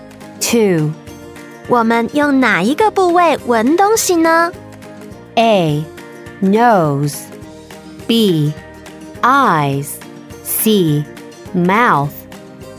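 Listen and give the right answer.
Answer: A: Nose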